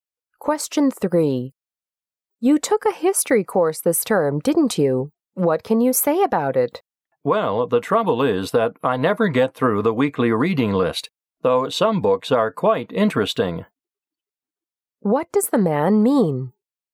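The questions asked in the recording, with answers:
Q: What does the man mean?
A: He can never finish the weekly reading list, which is too heavy.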